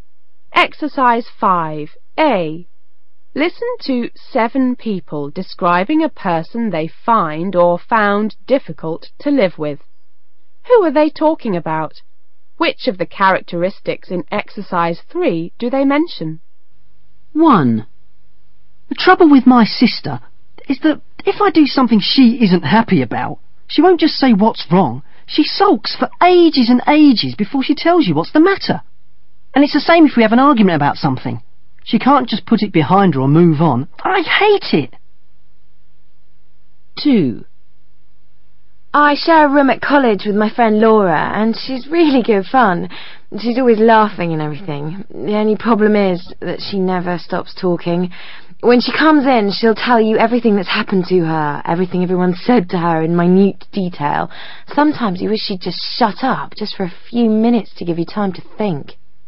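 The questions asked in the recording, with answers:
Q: Who are they talking about?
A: Her sister

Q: Who are they talking about?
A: Her friend Laura, who shares a room with her at college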